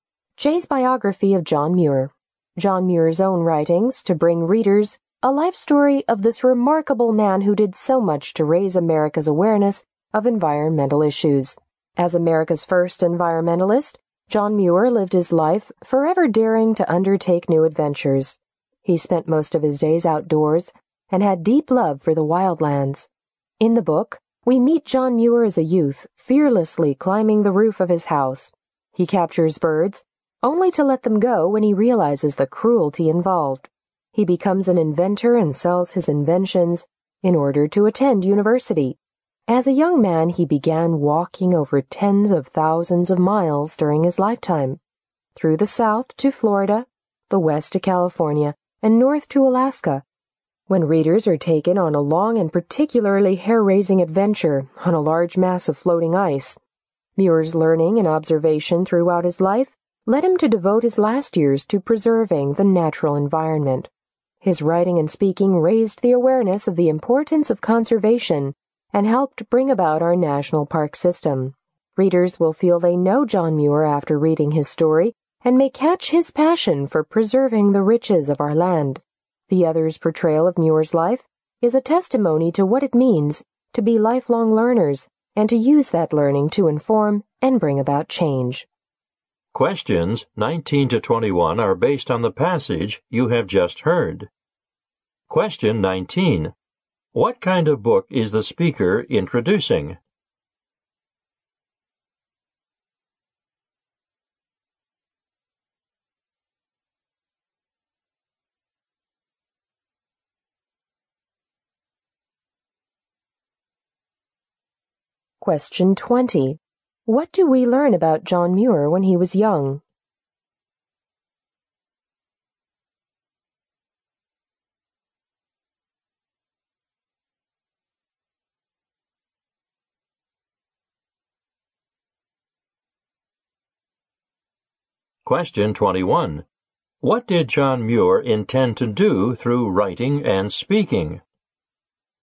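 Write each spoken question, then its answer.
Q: What kind of book is the speaker introducing?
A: A biography of John Muir

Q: What did John Muir intend to do through writing and speaking?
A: Raise awareness of the importance of conservation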